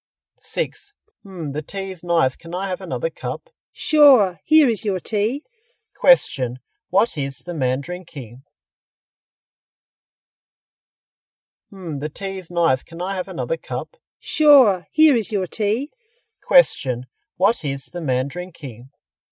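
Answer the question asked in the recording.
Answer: Tea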